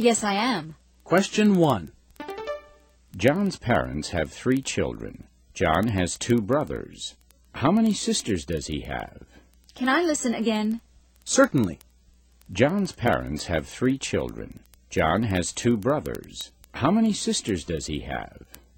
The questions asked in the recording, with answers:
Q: John's parents have 3 children. John has 2 brothers. How many sisters does he have?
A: The answer is, he doesn't have any sisters.